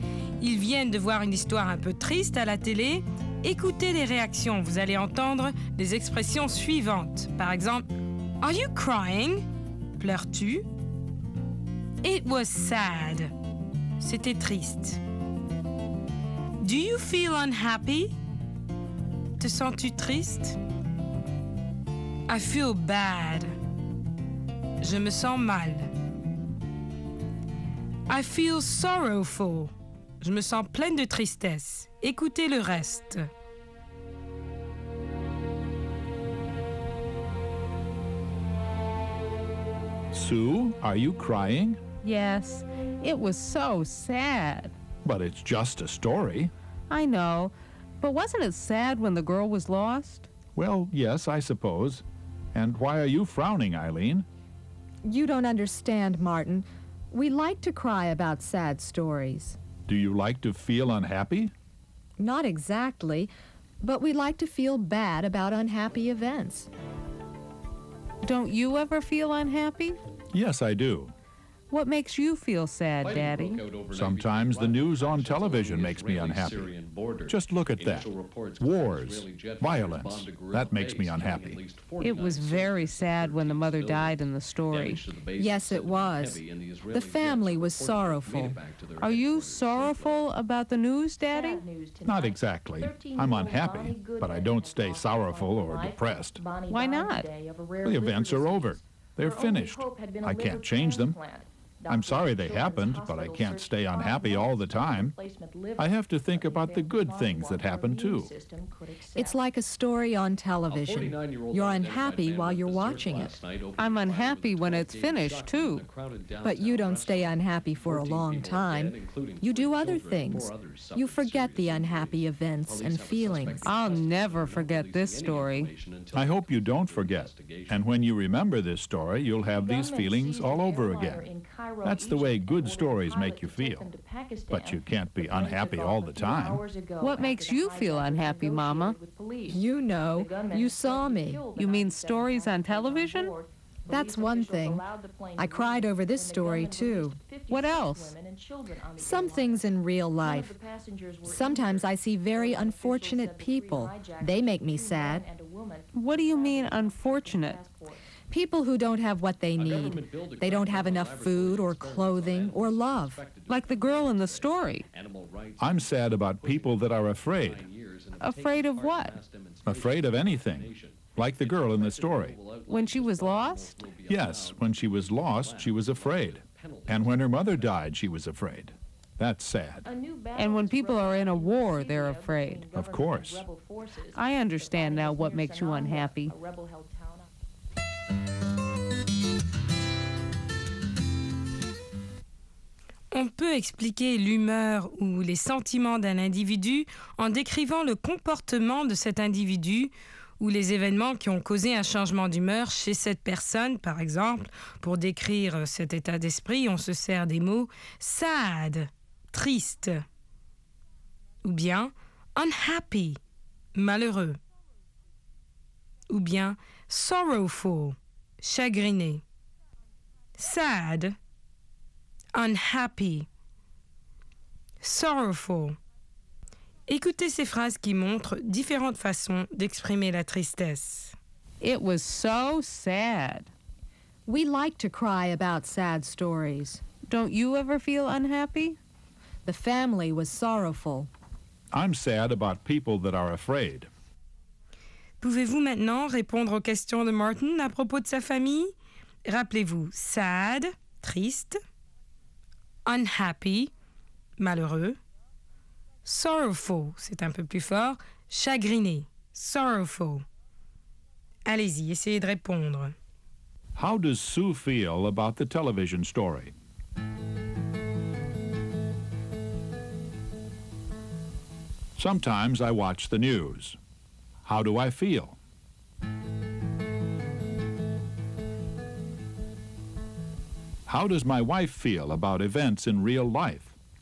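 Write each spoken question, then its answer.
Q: How does Sue feel about the television story?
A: She feels sad; she cried because the story was so sad.

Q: How do I feel?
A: Unhappy, but not sorrowful or depressed for long.

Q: How does my wife feel about events in real life?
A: Sad about unfortunate people and people who are afraid.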